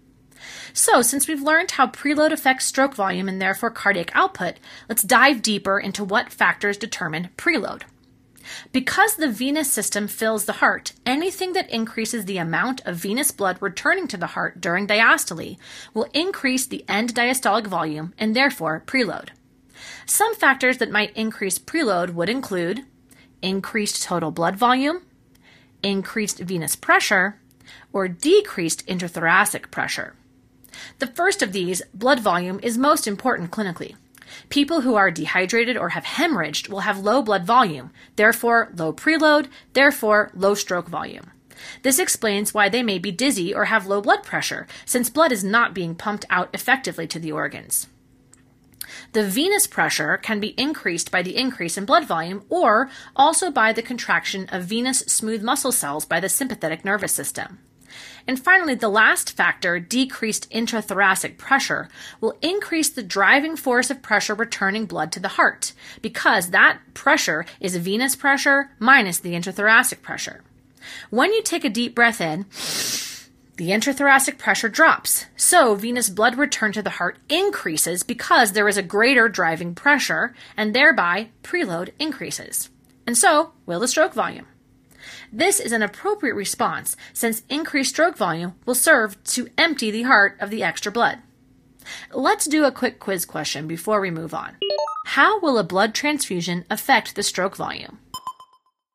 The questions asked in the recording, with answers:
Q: How will a blood transfusion affect the stroke volume?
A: This means an increase in preload and consequently the stroke volume and, finally, cardiac output.